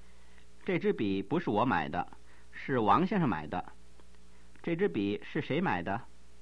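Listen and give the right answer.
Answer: 王先生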